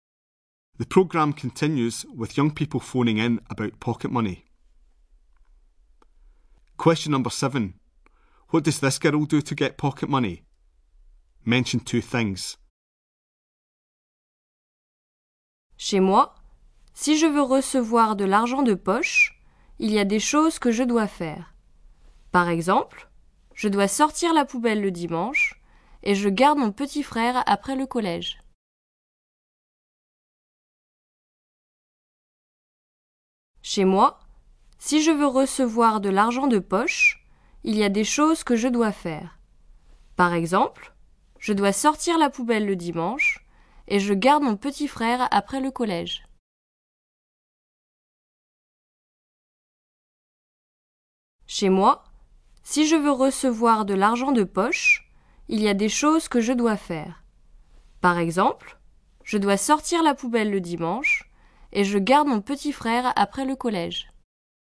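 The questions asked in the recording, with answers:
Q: What does this girl do to get pocket money?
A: Takes out the bin on Sundays; looks after her little brother after school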